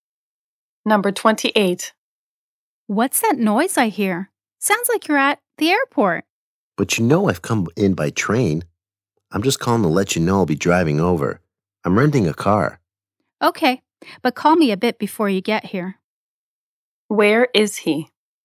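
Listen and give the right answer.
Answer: At the train station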